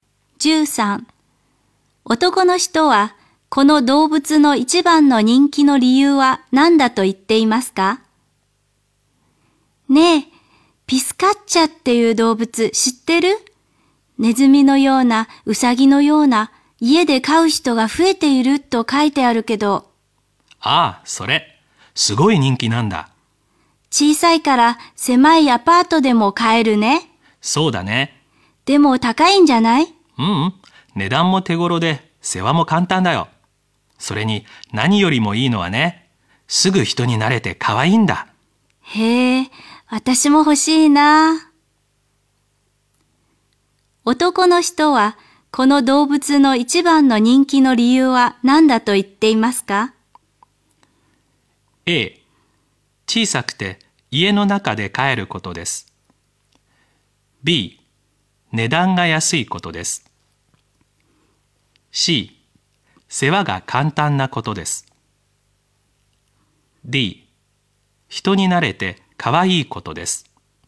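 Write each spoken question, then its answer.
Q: 男の人はこの動物の一番の人気の理由は何だと言っていますか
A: D: 人に慣れてかわいいことです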